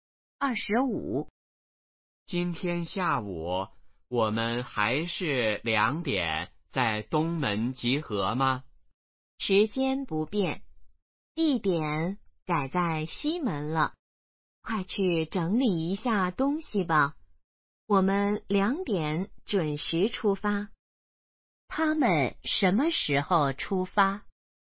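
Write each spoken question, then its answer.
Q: 他们什么时候出发?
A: 下午两点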